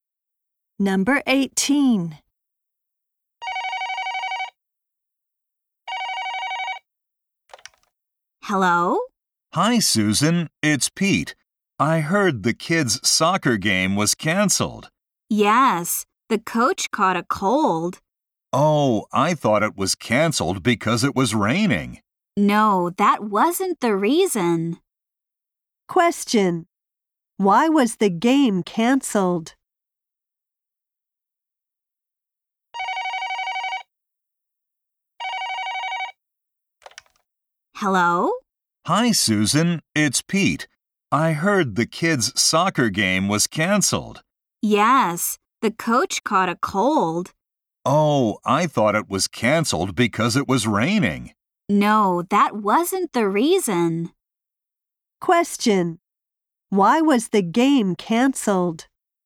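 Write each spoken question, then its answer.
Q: Why was the game canceled?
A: The coach caught a cold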